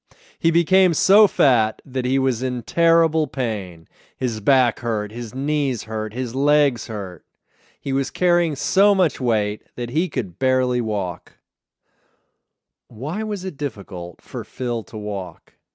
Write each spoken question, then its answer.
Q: Why was it difficult for Phil to walk?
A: It was difficult for Phil to walk because he was carrying so much weight.